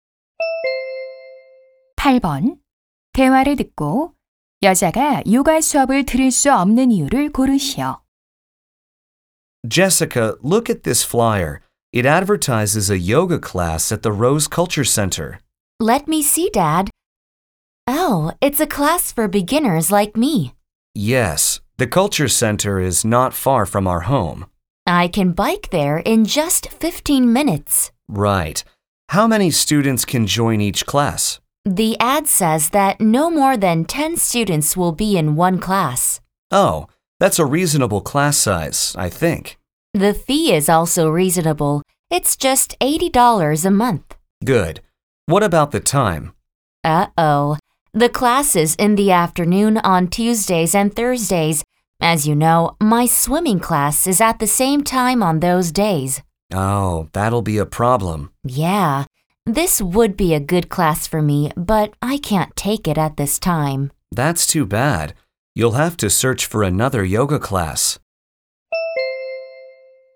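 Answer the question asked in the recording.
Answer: 같은 시간에 수영 수업이 있어서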